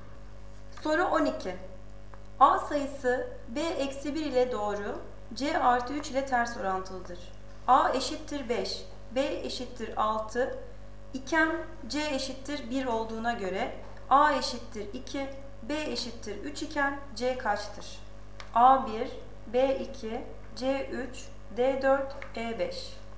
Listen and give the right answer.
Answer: Doğru cevap A 1.